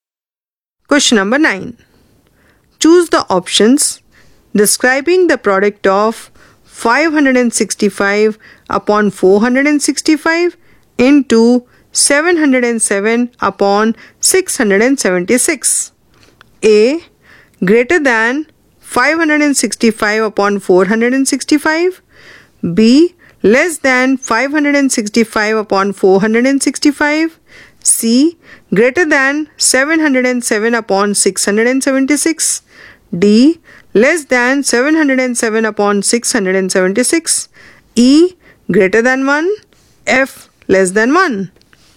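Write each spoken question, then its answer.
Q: Choose the options describing the product of 565 upon 465 into 707 upon 676.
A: A: Greater than 565 upon 465; C: Greater than 707 upon 676; E: Greater than 1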